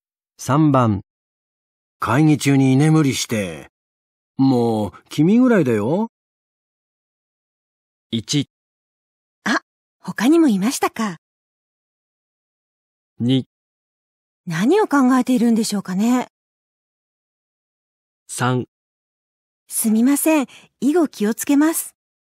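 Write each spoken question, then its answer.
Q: 会議中に居眠りして。もう、君ぐらいだよ。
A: 3: すみません。以後気をつけます。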